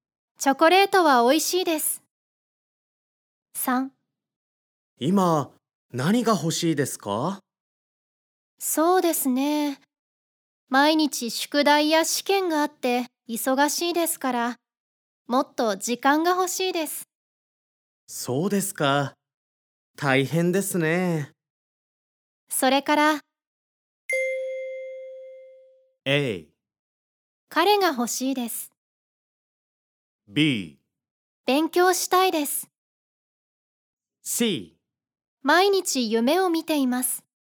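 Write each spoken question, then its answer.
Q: それから。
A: A: 彼が欲しいです。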